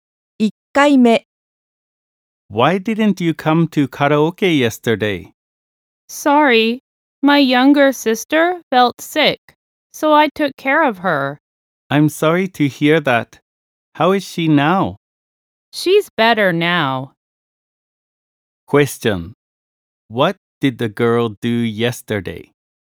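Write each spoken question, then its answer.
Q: What did the girl do yesterday?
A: She took care of her younger sister.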